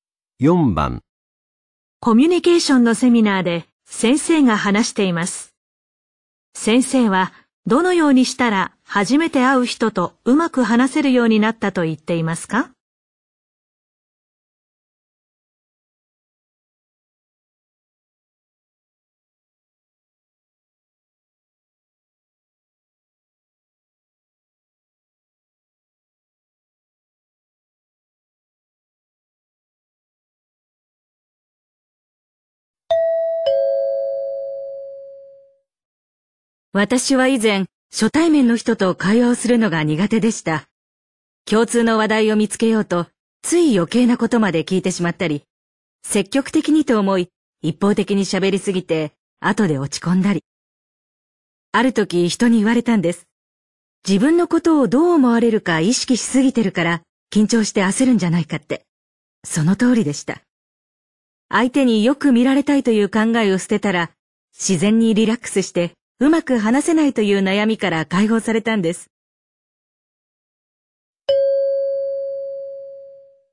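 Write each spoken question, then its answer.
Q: 先生はどのようにしたら初めて会う人とうまく話せるようになったと言っていますか?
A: 相手によく見られたいという考えを捨てたら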